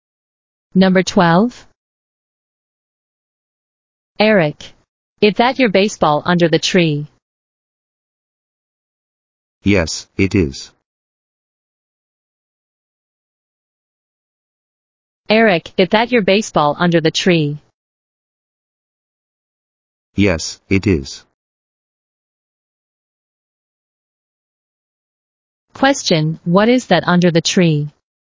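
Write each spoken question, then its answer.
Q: Question, what is that under the tree?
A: A baseball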